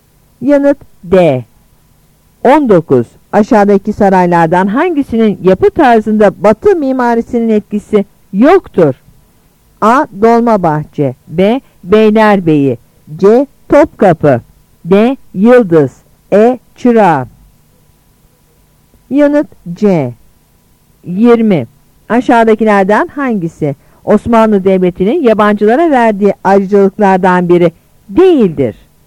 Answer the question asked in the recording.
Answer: Yanıt C.